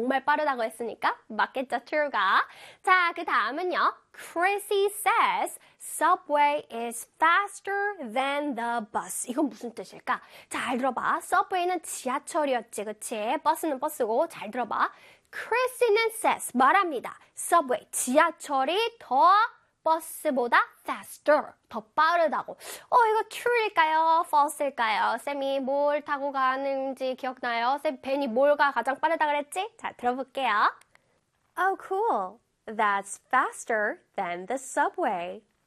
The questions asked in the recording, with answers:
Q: Chrissy says subway is faster than the bus.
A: False가 돼야 되겠죠?